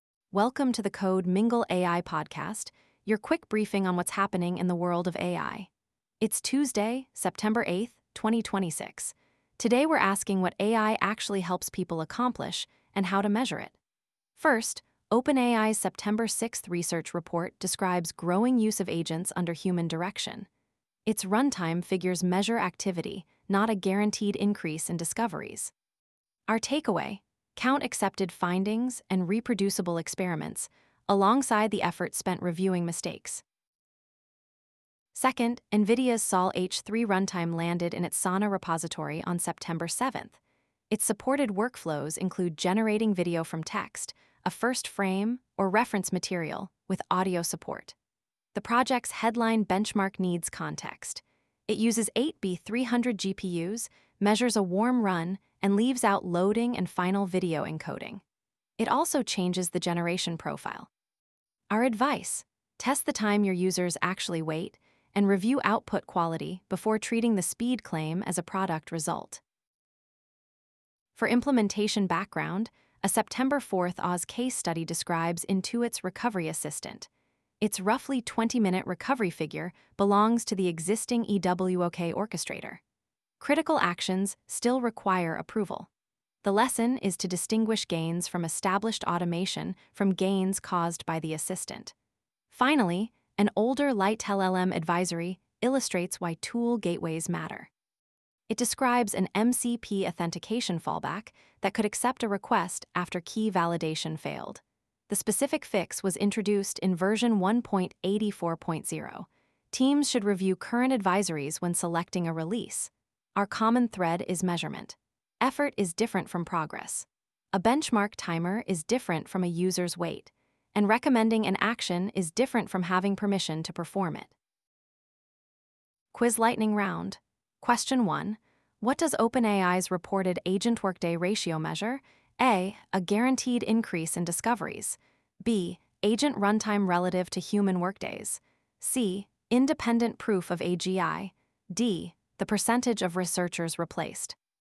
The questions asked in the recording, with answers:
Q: What does OpenAI's reported agent workday ratio measure?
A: The answer is B. Runtime measures effort.